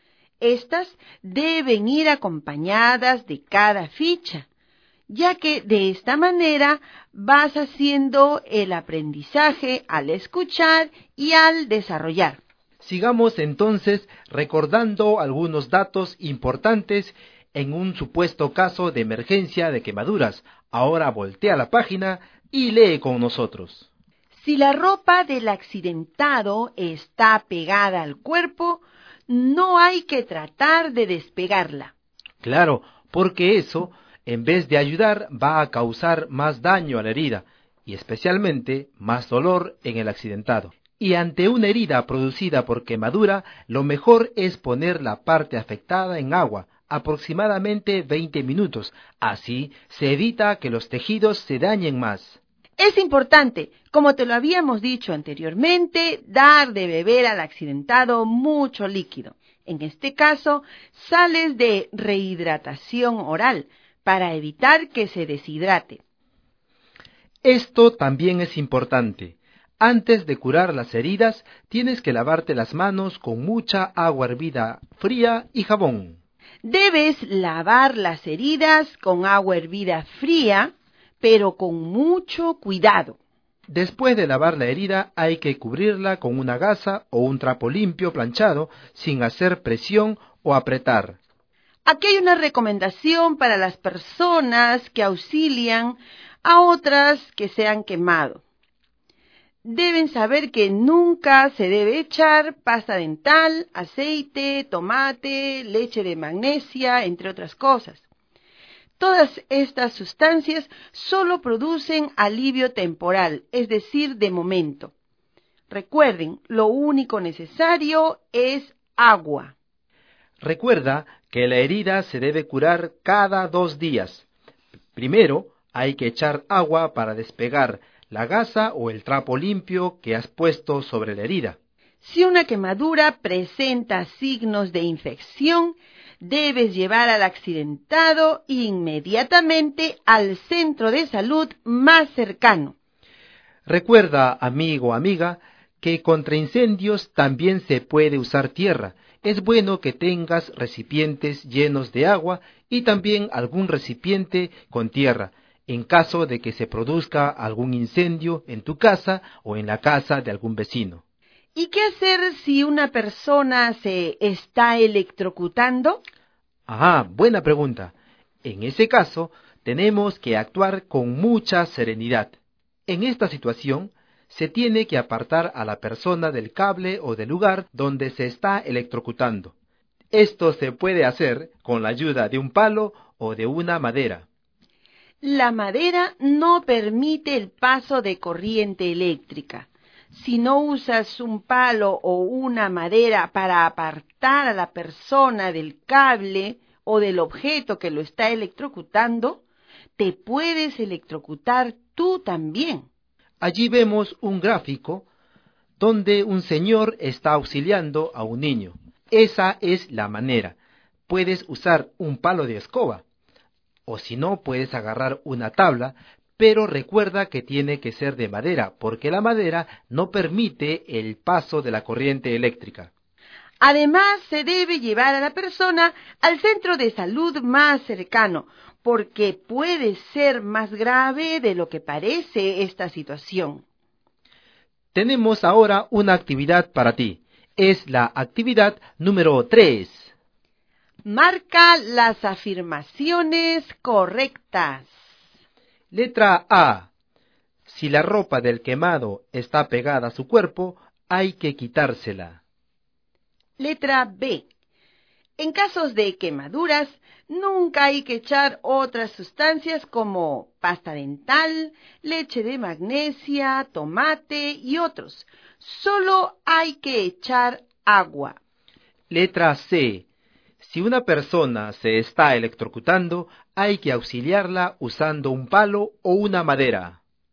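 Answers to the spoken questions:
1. Incorrecta
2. Correcta
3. Correcta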